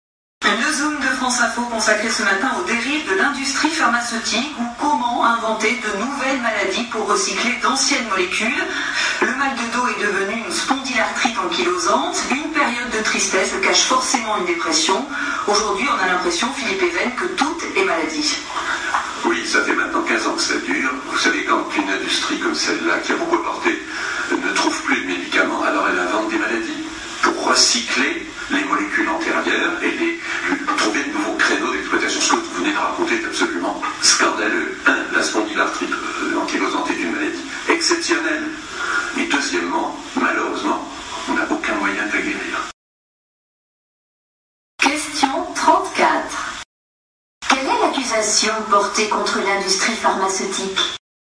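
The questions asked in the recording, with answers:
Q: Quelle est l'accusation portée contre l'industrie pharmaceutique ?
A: Elle invente de nouvelles maladies pour recycler d'anciennes molécules.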